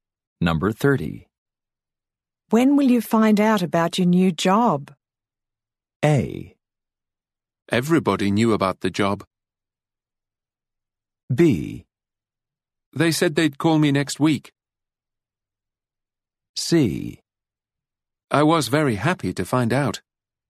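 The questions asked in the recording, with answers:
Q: When will you find out about your new job?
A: B: They said they'd call me next week.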